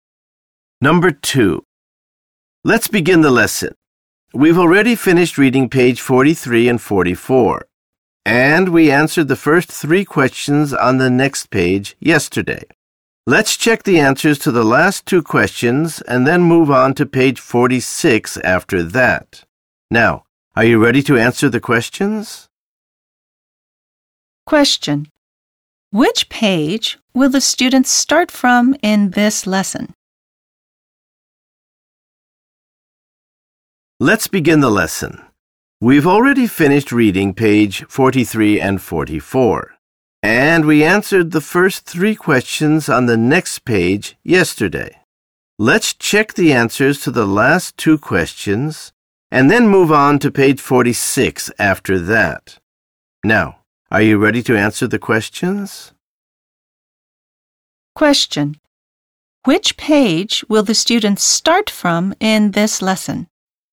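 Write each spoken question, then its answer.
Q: Which page will the students start from in this lesson?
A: Page 45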